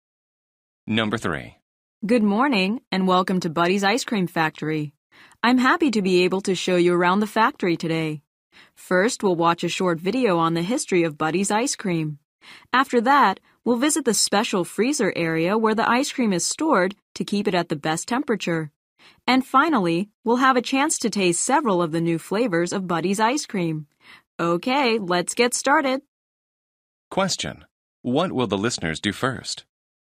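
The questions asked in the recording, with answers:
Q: What will the listeners do first?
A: Watch a short video on the history of Buddy's Ice Cream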